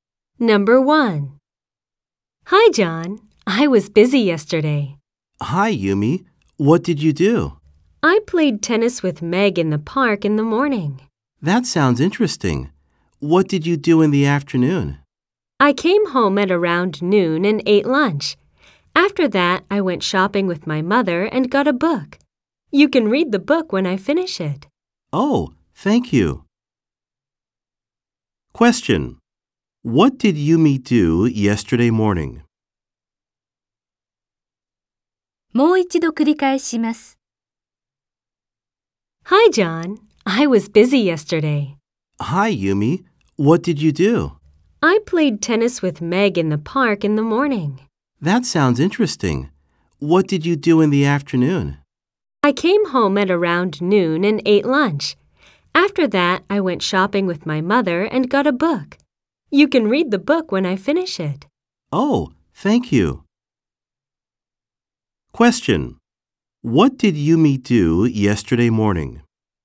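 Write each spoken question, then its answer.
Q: What did Yumi do yesterday morning?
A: She played tennis with Meg in the park.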